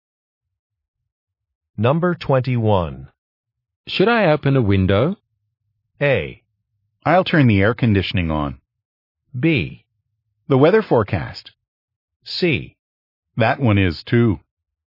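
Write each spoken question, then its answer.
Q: Should I open a window?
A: A: I'll turn the air conditioning on.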